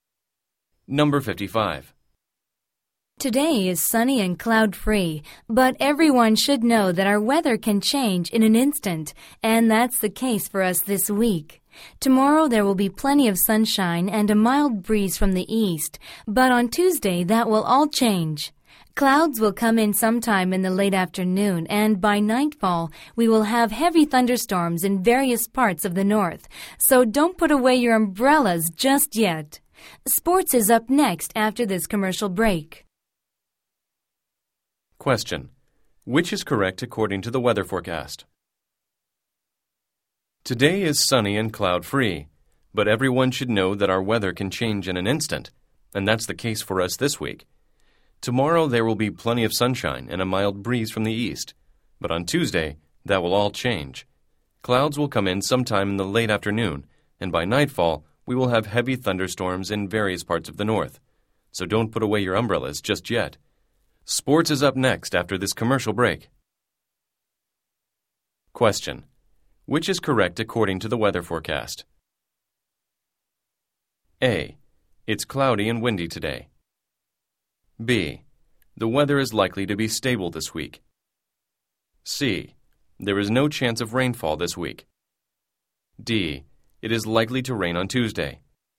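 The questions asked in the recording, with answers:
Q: Which is correct according to the weather forecast?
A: D: It is likely to rain on Tuesday.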